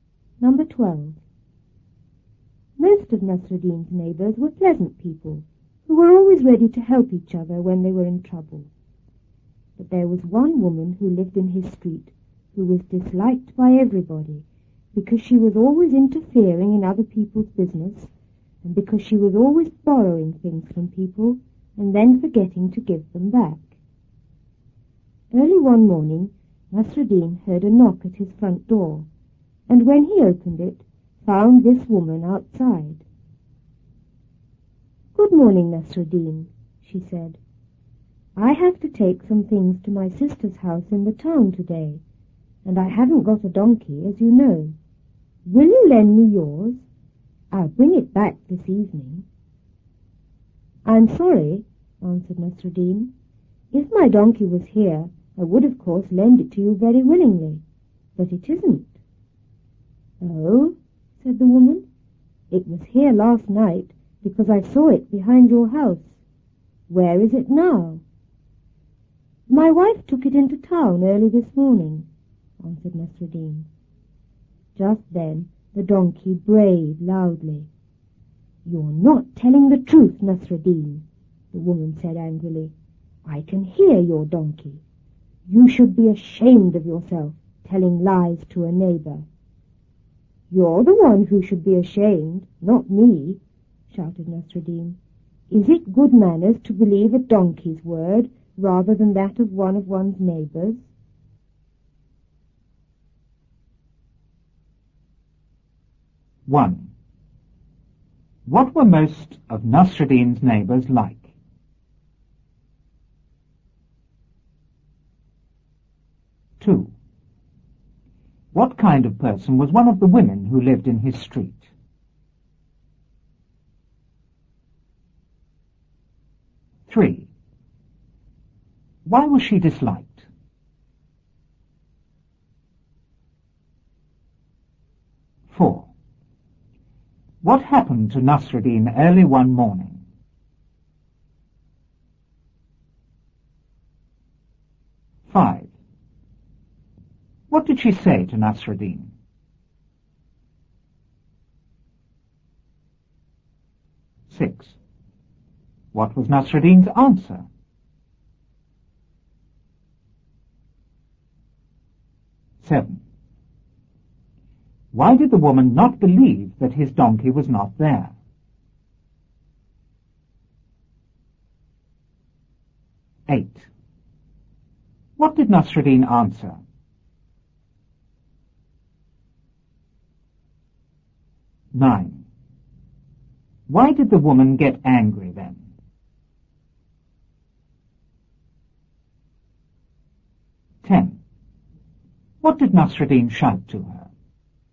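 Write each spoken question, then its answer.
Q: What were most of Nasruddin's neighbors like?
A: Pleasant people, always ready to help each other in trouble

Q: What kind of person was one of the women who lived in his street?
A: Disliked by everybody; interfering and always borrowing things

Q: Why was she disliked?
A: She interfered in other people's business and borrowed things without giving them back

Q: What happened to Nasruddin early one morning?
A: He heard a knock at his door and found the woman outside

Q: What did she say to Nasruddin?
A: She asked to borrow his donkey to take things to her sister's house in town

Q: What was Nasruddin's answer?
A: He was sorry, but his donkey wasn't there

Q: Why did the woman not believe that his donkey was not there?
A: She had seen it behind his house the night before

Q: What did Nasruddin answer?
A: His wife had taken it into town early that morning

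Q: Why did the woman get angry then?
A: The donkey brayed loudly, so she knew he was lying

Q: What did Nasruddin shout to her?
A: She should be ashamed for believing a donkey's word rather than a neighbor's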